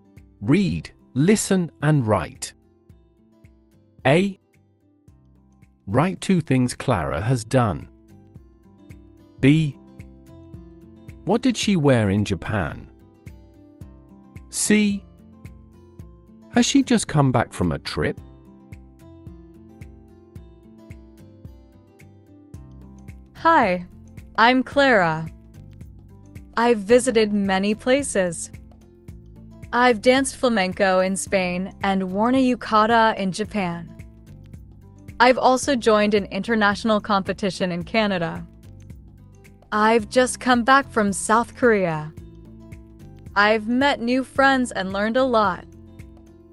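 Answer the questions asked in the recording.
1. Danced flamenco in Spain and worn a yukata in Japan
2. A yukata
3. Yes, from South Korea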